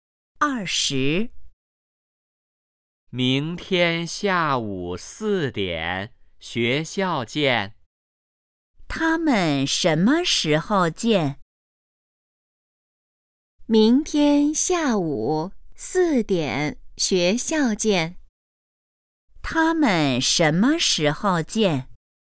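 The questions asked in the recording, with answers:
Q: 他们什么时候见?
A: 明天下午四点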